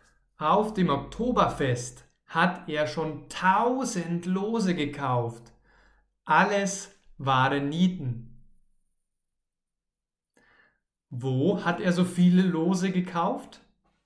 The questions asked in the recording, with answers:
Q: Wo hat er so viele Lose gekauft?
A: Auf dem Oktoberfest. Er hat auf dem Oktoberfest so viele Lose gekauft.